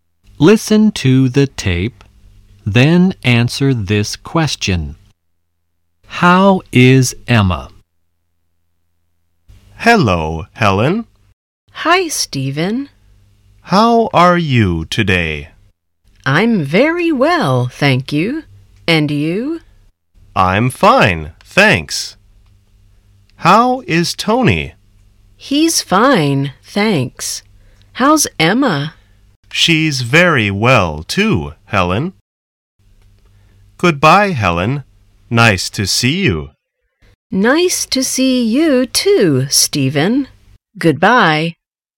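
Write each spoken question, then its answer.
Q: How is Emma?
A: She's very well.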